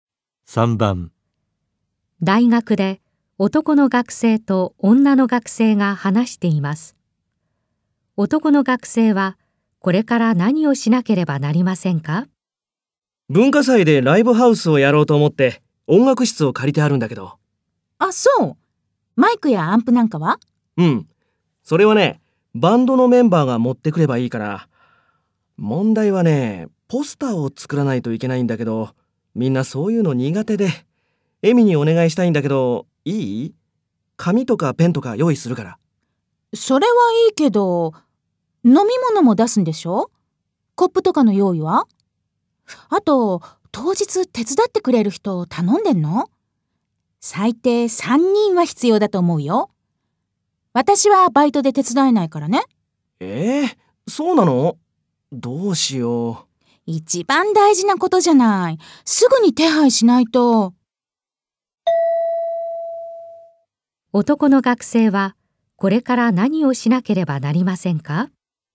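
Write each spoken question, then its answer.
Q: 男の学生はこれから何をしなければなりませんか?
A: 当日手伝ってくれる人(最低3人)を頼む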